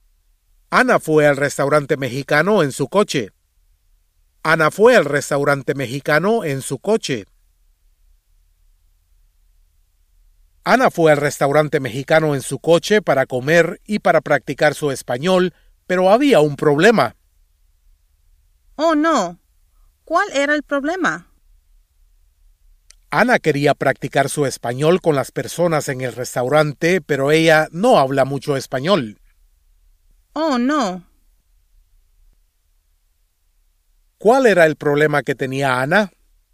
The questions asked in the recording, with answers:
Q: ¿Cuál era el problema que tenía Anna?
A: Su problema era que ella quería hablar el español con las personas en el restaurante, pero ella no habla mucho español.